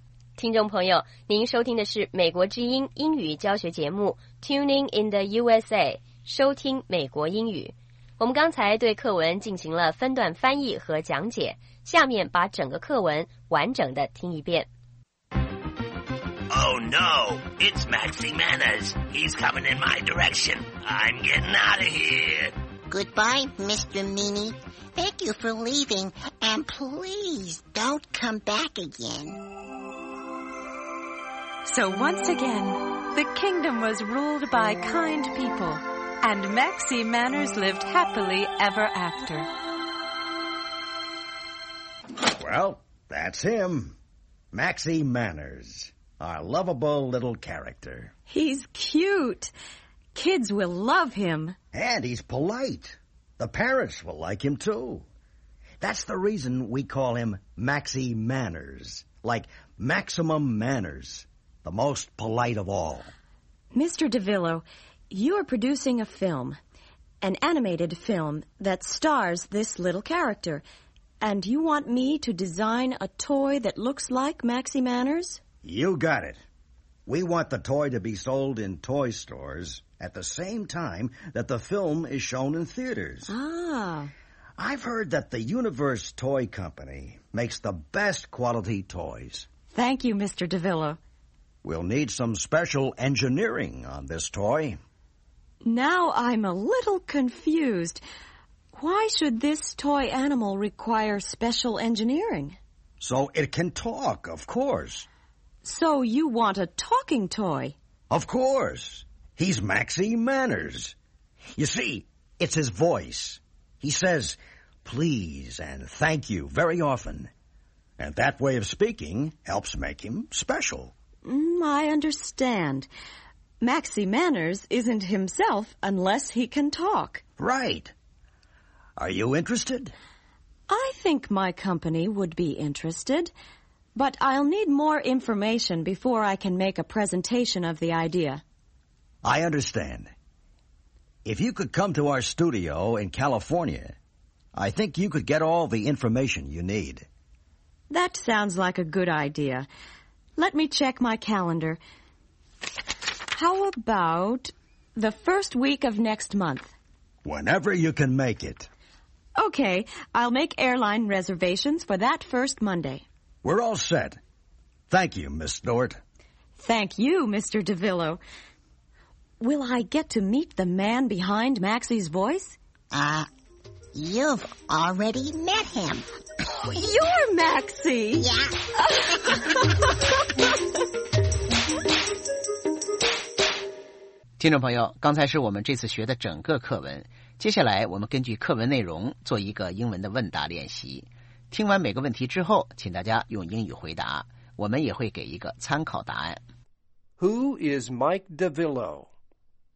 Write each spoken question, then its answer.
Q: Who is Mike DeVillo?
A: He is a film producer.